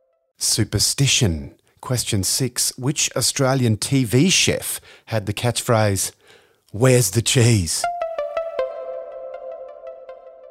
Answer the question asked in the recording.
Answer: Peter Russell Clark.